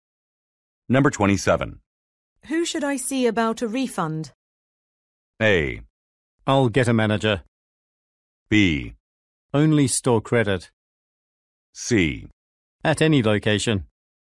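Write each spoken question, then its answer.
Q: Who should I see about a refund?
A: A: I'll get a manager.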